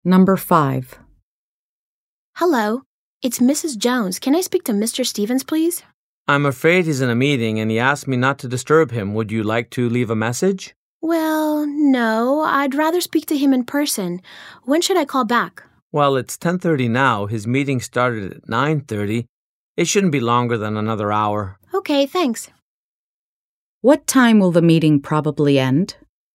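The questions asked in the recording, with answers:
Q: What time will the meeting probably end?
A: 11:30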